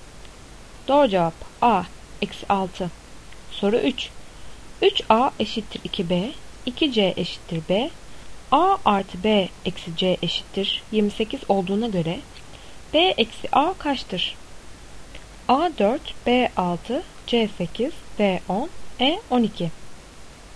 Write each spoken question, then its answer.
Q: 3A eşittir 2B, 2C eşittir B, A artı B eksi C eşittir 28 olduğuna göre B eksi A kaçtır?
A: Doğru cevap C 8.